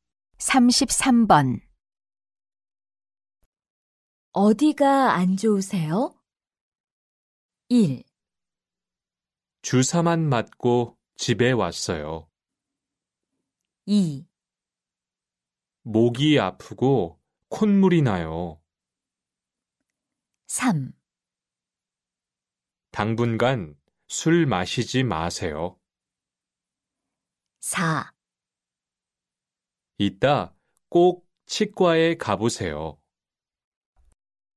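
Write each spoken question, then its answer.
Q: 어디가 안 좋으세요?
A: 2: 목이 아프고 콧물이 나요.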